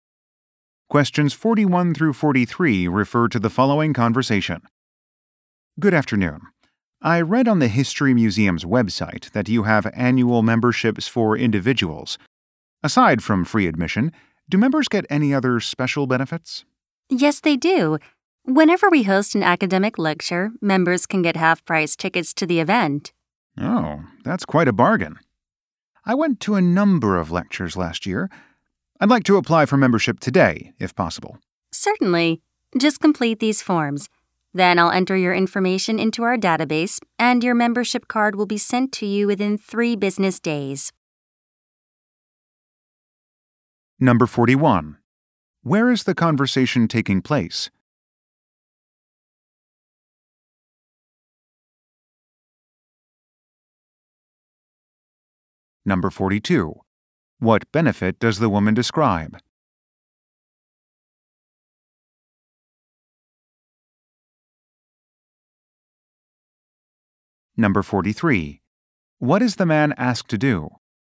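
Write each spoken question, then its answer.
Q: Where is the conversation taking place?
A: At a history museum

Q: What benefit does the woman describe?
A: Half-price tickets to lectures

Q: What is the man asked to do?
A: Complete some forms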